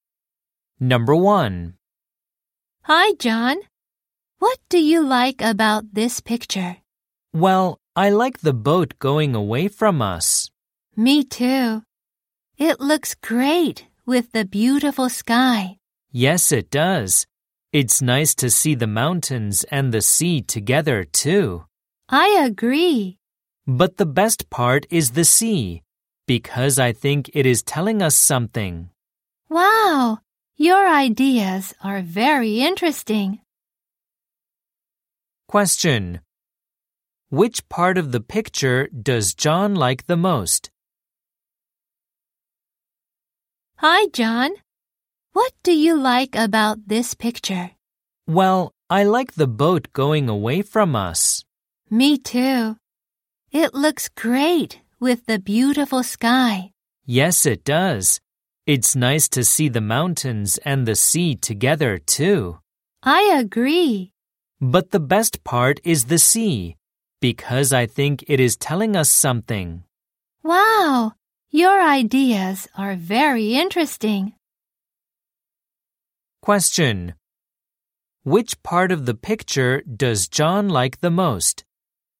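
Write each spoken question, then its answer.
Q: Which part of the picture does John like the most?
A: The sea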